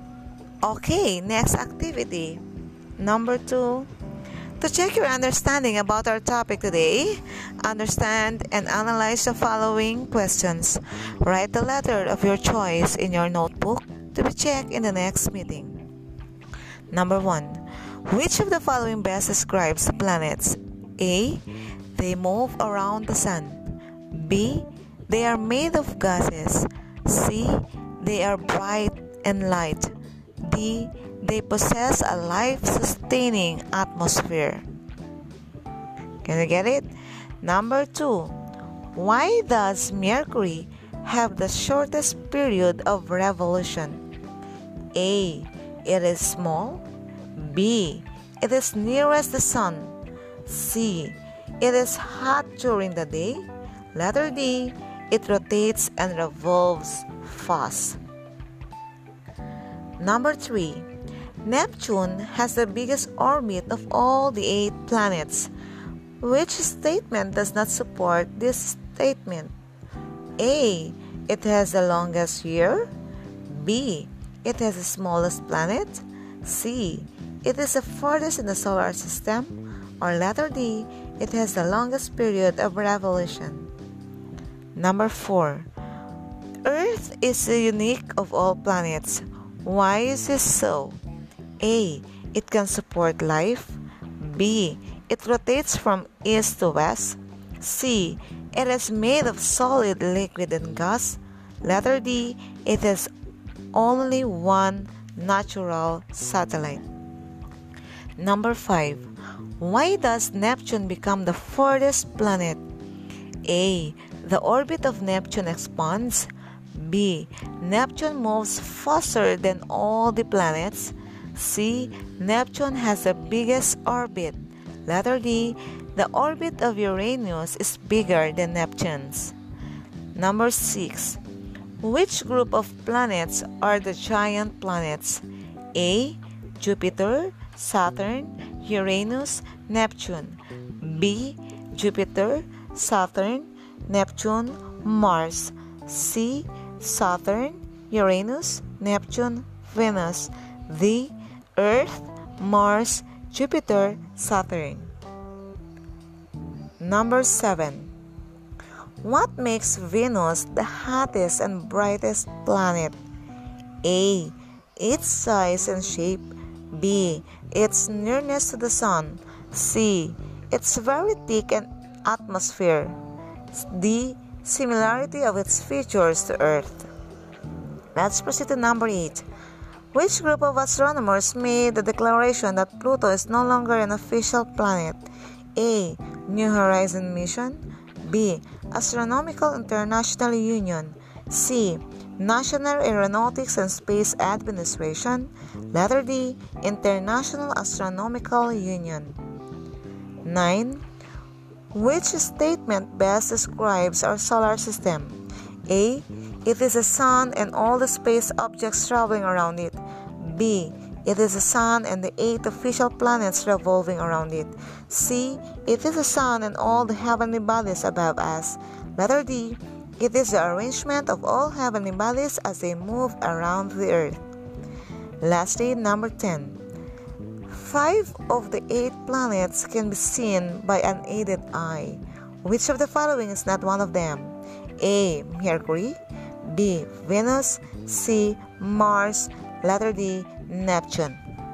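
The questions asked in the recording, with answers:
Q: Which of the following best describes the planets?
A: A: They move around the sun.

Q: Why does Mercury have the shortest period of revolution?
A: B: It is nearest the sun.

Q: Which statement does not support this statement?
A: B: It has the smallest planet.

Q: Why is this so?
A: A: It can support life.

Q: Which group of planets are the giant planets?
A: A: Jupiter, Saturn, Uranus, Neptune.

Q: Which group of astronomers made the declaration that Pluto is no longer an official planet?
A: D: International Astronomical Union.

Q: Which statement best describes our solar system?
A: A: It is the Sun and all the space objects traveling around it.

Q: Which of the following is not one of them?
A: D: Neptune.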